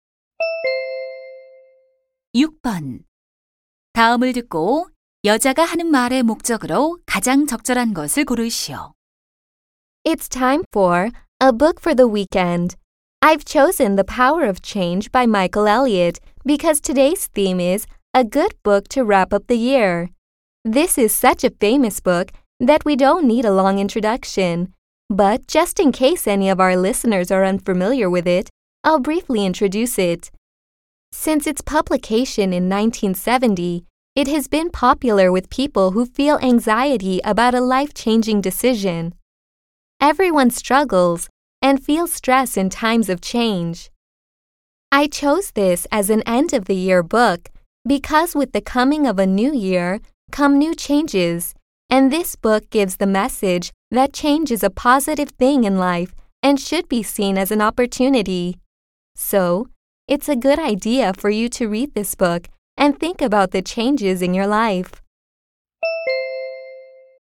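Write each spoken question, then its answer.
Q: 다음을 듣고 여자가 하는 말의 목적으로 가장 적절한 것을 고르시오.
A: 연말에 읽을 책 소개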